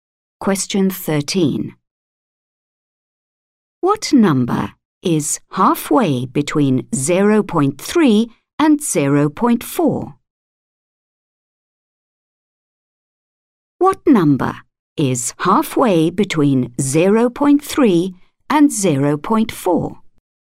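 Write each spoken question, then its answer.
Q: What number is halfway between 0.3 and 0.4?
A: 0.35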